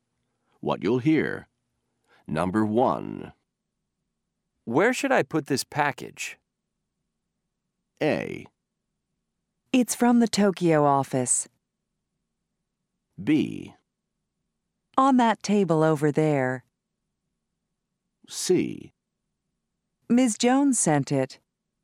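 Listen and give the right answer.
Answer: B: On that table over there.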